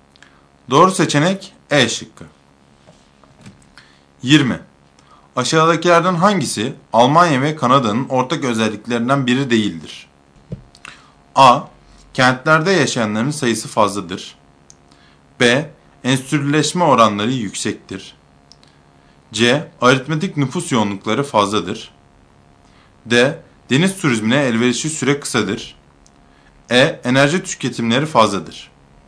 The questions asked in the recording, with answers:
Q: Aşağıdakilerden hangisi Almanya ve Kanada'nın ortak özelliklerinden biri değildir?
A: Doğru cevap C şıkkı.